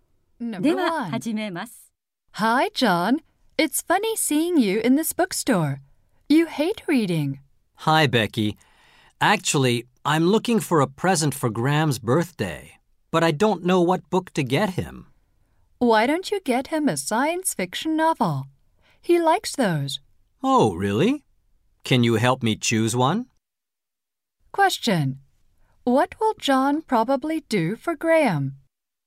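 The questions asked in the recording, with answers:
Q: What will John probably do for Graham?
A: Buy him a science fiction novel for his birthday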